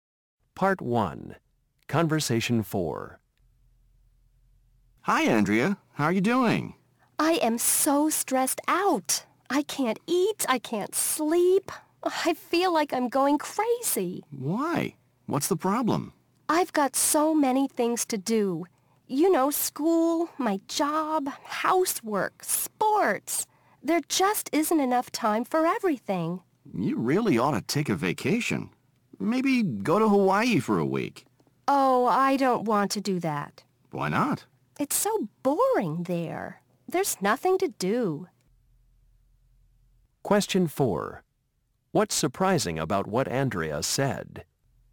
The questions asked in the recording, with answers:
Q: What's surprising about what Andrea said?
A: You're complaining about how stressed out you are, but you don't even want some time to relax.